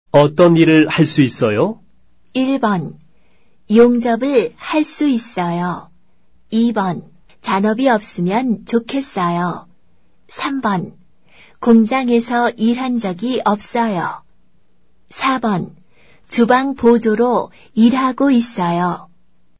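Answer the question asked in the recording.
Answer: 1: 용접을 할 수 있어요.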